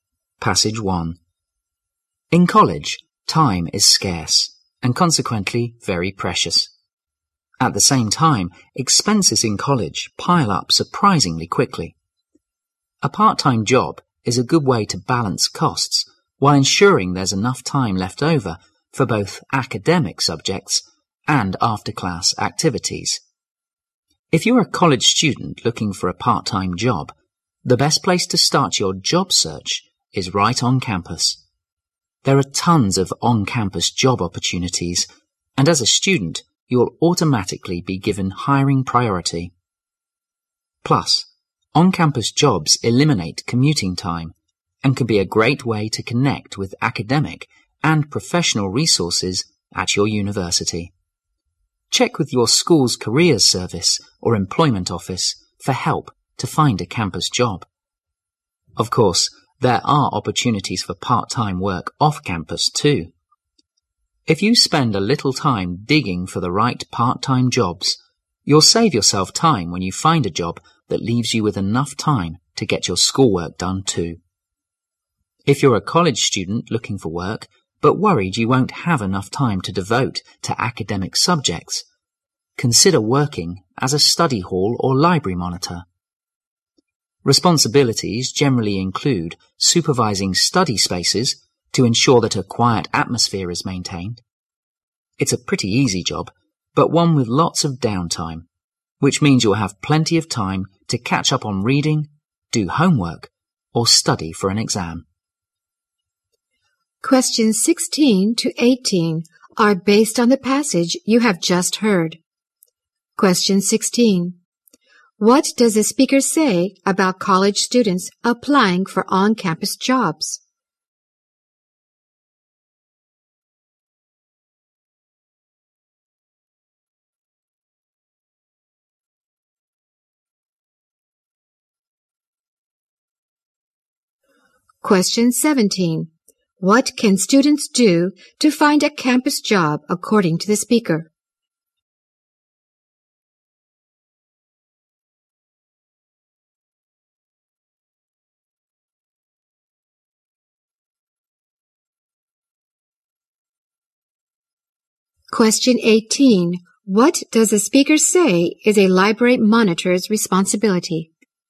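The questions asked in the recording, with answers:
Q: What does the speaker say about college students applying for on-campus jobs?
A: They are given hiring priority

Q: What can students do to find a campus job according to the speaker?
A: Check with the school's careers service or employment office

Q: What does the speaker say is a library monitor's responsibility?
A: Supervising study spaces to keep them quiet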